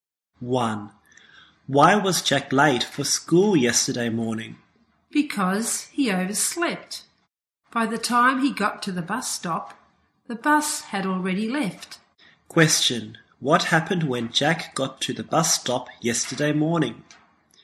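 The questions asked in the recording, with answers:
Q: What happened when Jack got to the bus stop yesterday morning?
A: The bus had already left.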